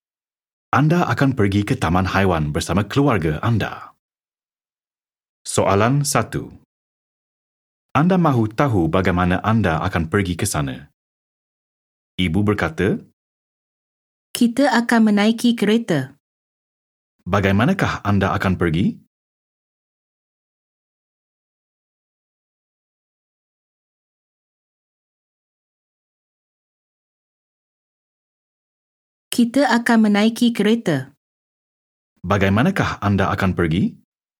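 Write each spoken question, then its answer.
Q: Bagaimanakah anda akan pergi?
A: Menaiki kereta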